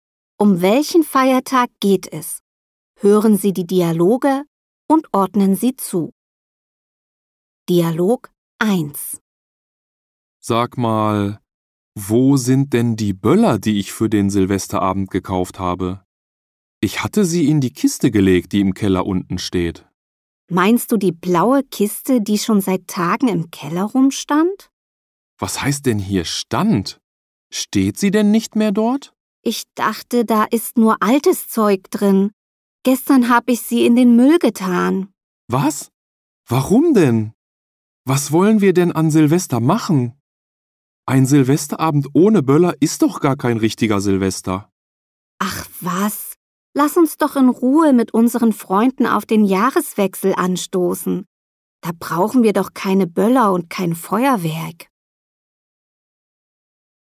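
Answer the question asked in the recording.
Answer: Silvester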